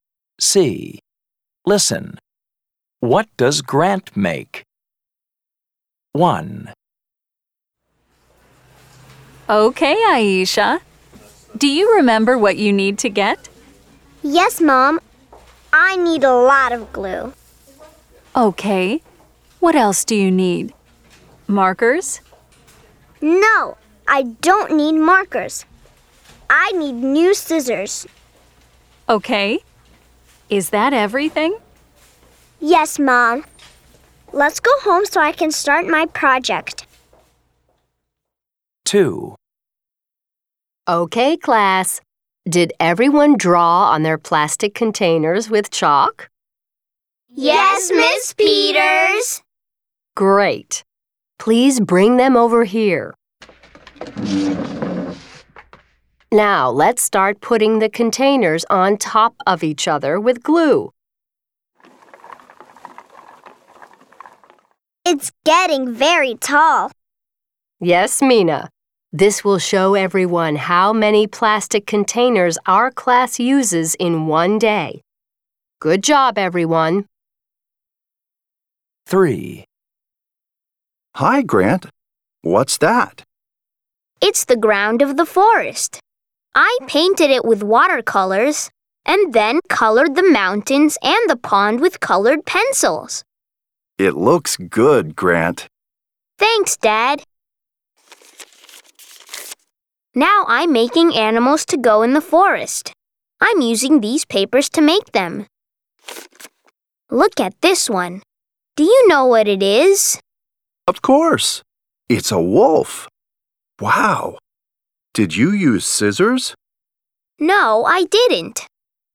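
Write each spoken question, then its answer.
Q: What does Grant make?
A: A forest scene with paper animals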